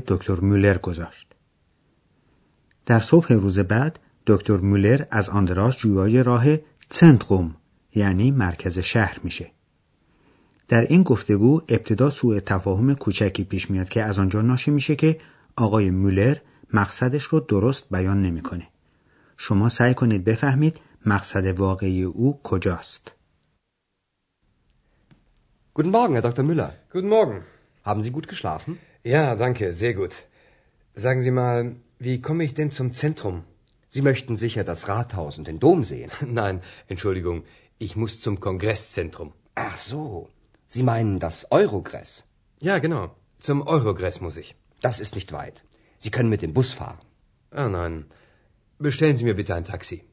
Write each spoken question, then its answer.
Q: شما سعی کنید بفهمید مقصد واقعی او کجاست.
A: پس آقای مولر قصد رفتن به مرکز شهر را نداشت بلکه مقصد او مرکز کنگره یعنی تالار کنفرانس شهر آخن بود که اویروگرس نام داره